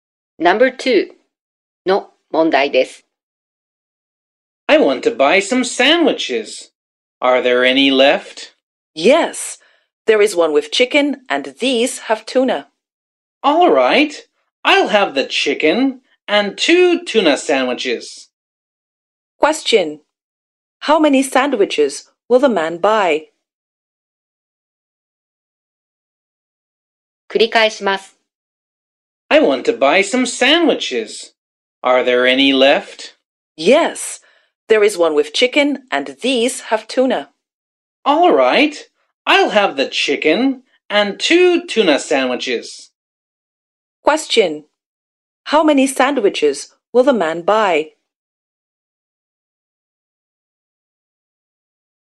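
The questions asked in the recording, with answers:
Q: How many sandwiches will the man buy?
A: Three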